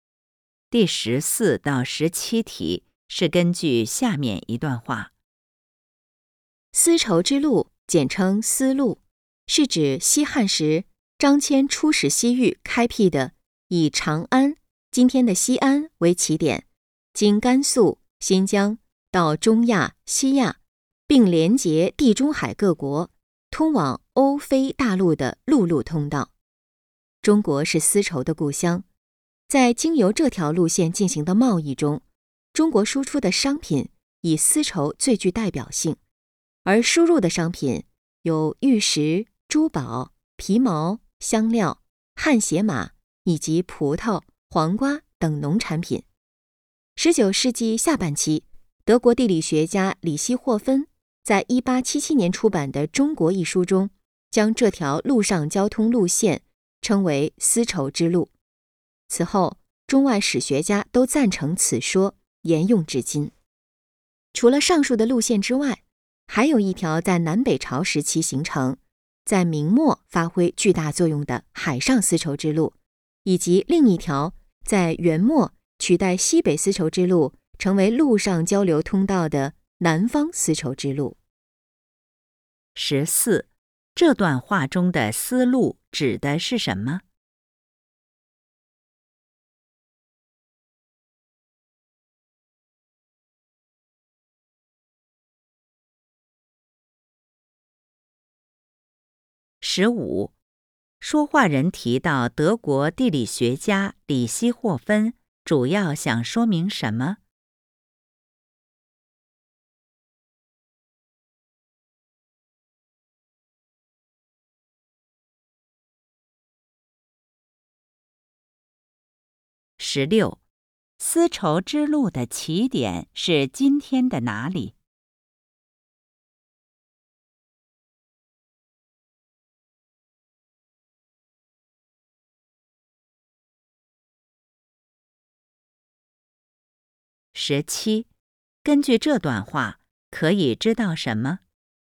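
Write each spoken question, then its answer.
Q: 这段话中的丝路指的是什么?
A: 张骞开辟的以长安为起点、通往欧非大陆的陆路通道

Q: 说话人提到德国地理学家李希霍芬主要想说明什么?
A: "丝绸之路"这个名称是他提出的

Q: 丝绸之路的起点是今天的哪里?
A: 西安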